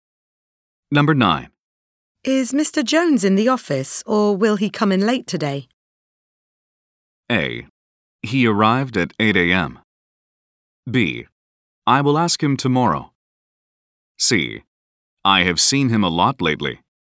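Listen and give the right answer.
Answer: A: He arrived at 8 a.m.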